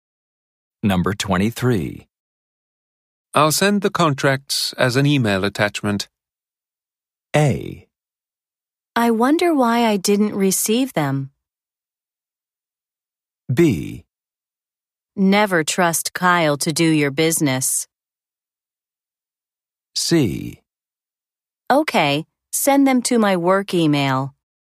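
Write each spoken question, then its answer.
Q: I'll send the contracts as an email attachment.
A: C: Okay, send them to my work email.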